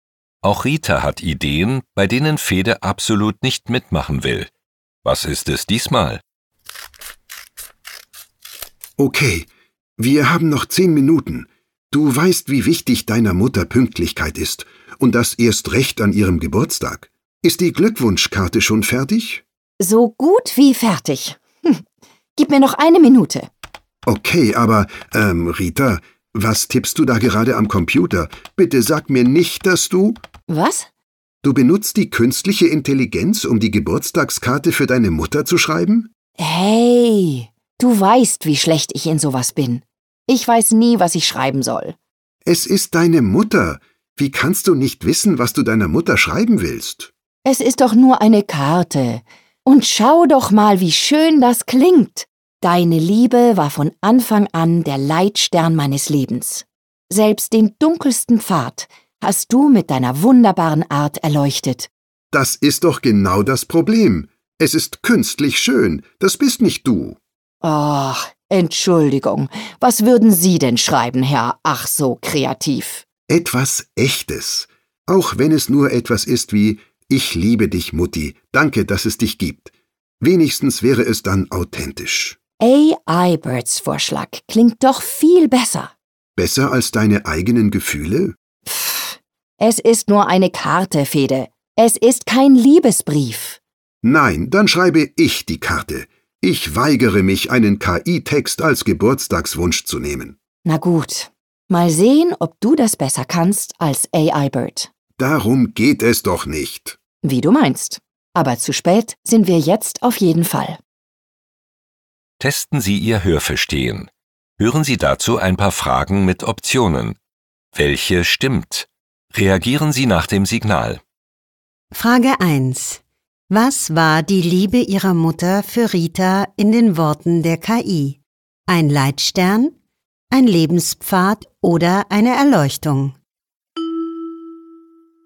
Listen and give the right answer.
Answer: In den Worten der KI war die Liebe ihrer Mutter ein Leitstern.